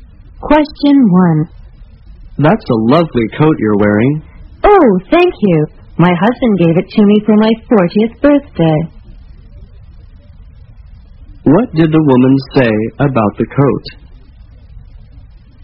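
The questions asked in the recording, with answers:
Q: What did the woman say about the coat?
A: Her husband gave it to her for her 40th birthday.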